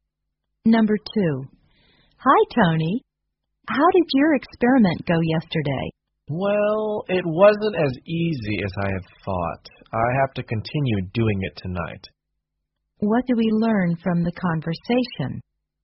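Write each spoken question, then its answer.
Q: What do we learn from the conversation?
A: Tony hasn't finished his experiment and will continue it tonight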